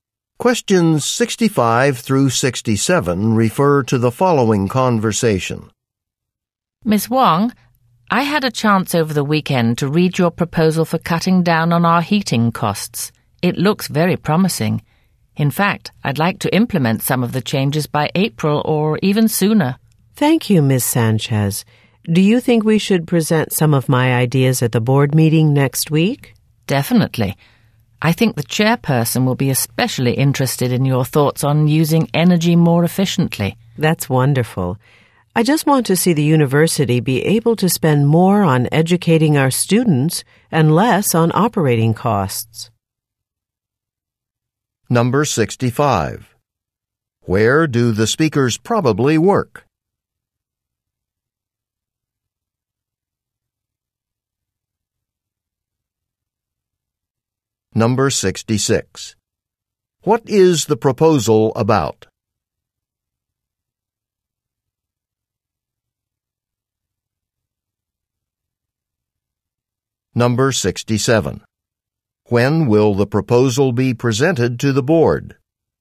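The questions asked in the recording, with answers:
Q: Where do the speakers probably work?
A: At a university

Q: What is the proposal about?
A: Cutting heating costs

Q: When will the proposal be presented to the board?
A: Next week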